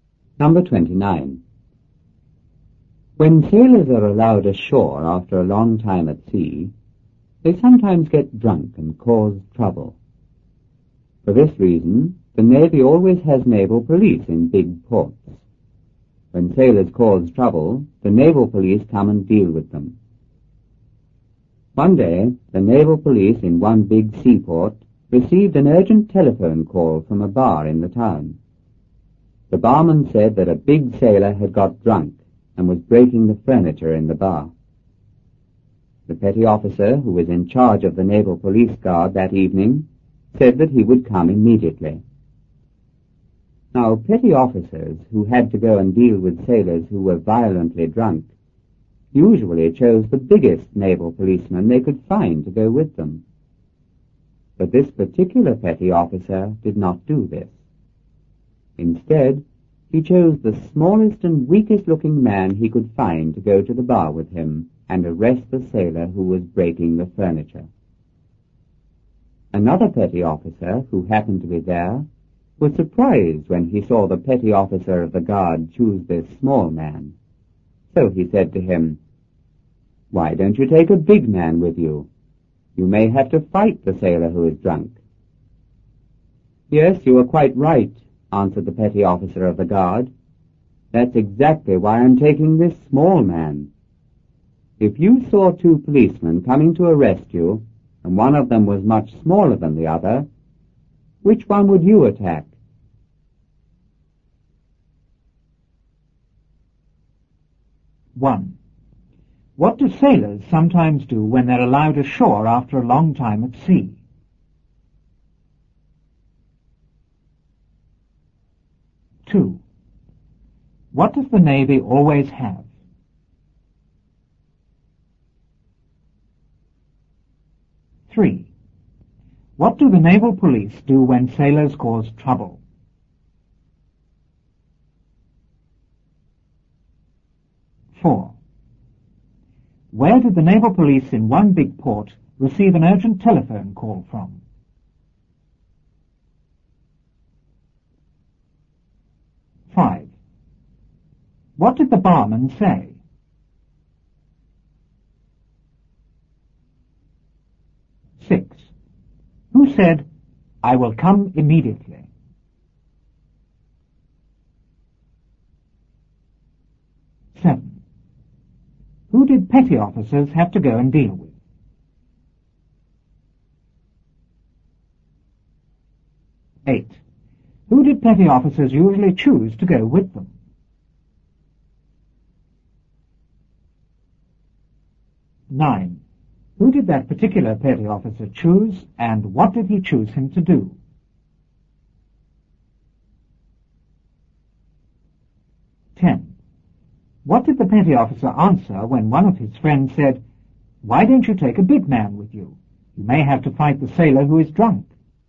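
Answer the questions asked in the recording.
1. They sometimes get drunk and cause trouble.
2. Naval police in big ports.
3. They come and deal with them.
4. From a bar in the town.
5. That a big sailor had got drunk and was breaking the furniture in the bar.
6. The petty officer in charge of the naval police guard that evening.
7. Sailors who were violently drunk.
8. The biggest naval policeman they could find.
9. The smallest and weakest-looking man, to go to the bar with him and arrest the sailor.
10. "Yes, you are quite right. That's exactly why I'm taking this small man. If you saw two policemen coming to arrest you, and one was much smaller, which one would you attack?"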